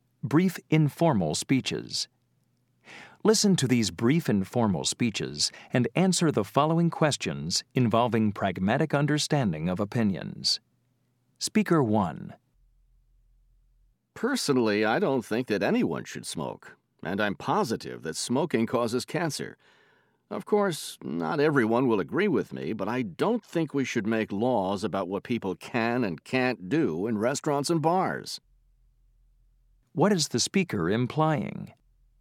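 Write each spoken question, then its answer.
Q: What is the speaker implying?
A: Smoking shouldn't be banned by law in restaurants and bars, even though it causes cancer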